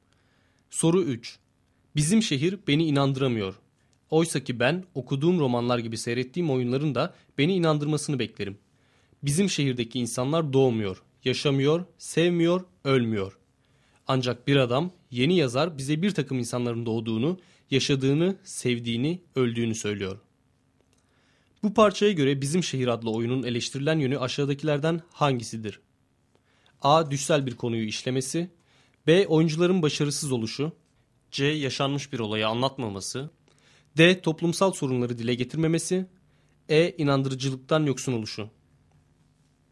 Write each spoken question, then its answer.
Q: Bu parçaya göre Bizim Şehir adlı oyunun eleştirilen yönü aşağıdakilerden hangisidir?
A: Doğru cevap E şıkkı.